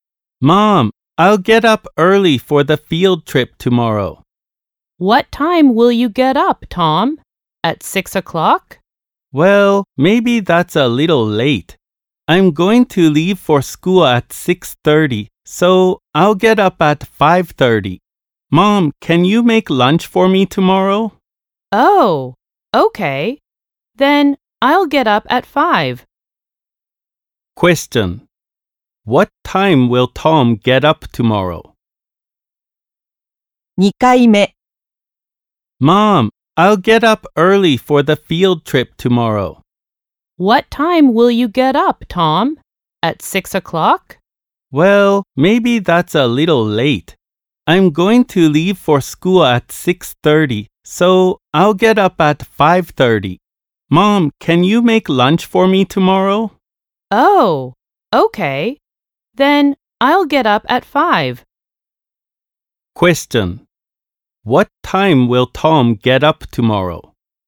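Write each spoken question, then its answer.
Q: What time will Tom get up tomorrow?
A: At 5 o'clock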